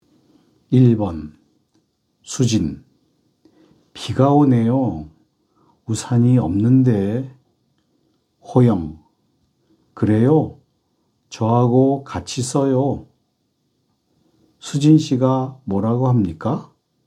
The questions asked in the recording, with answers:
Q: 수진 씨가 뭐라고 합니까?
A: 우산이 없다고 해요. 없대요.